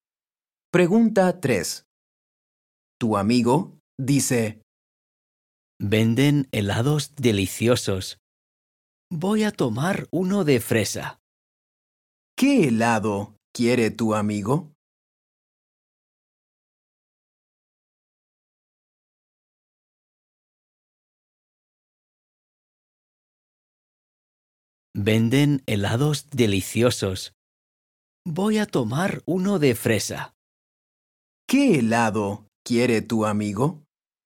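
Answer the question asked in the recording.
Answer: Uno de fresa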